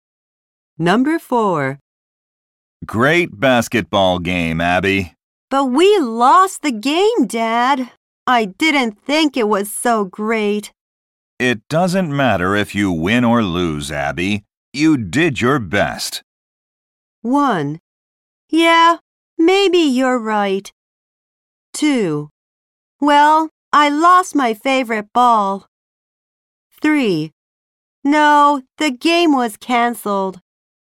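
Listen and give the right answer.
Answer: 1: Yeah, maybe you're right.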